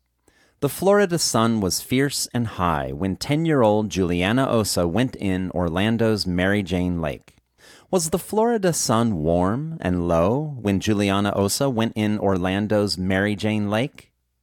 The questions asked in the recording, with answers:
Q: Was the Florida sun warm and low when Juliana Osa went in Orlando's Mary Jane Lake?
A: No, the Florida sun wasn't warm and low when Juliana Osa went in Orlando's Mary Jane Lake.